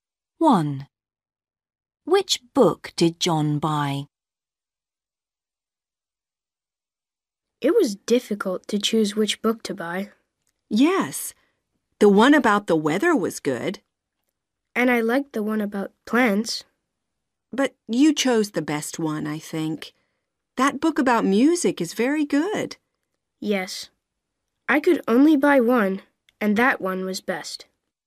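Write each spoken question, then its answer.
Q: Which book did John buy?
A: the book about music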